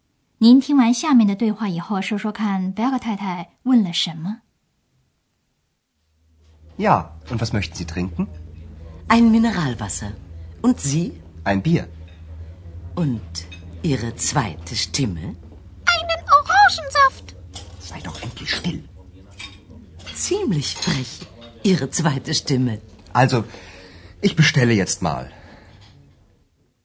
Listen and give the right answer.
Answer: 他略带讽刺地问:"那个声音 ,Stimme, 也就是指的小精灵要喝什么?"